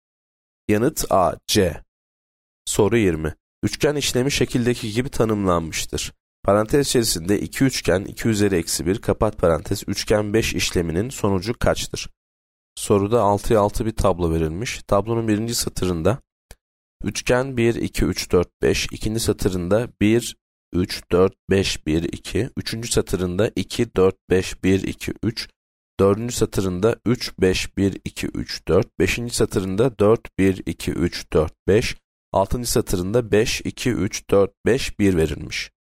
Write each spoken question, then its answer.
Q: Parantez içerisinde 2 üçgen 2 üzeri eksi 1 kapat parantez üçgen 5 işleminin sonucu kaçtır?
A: Yanıt E5.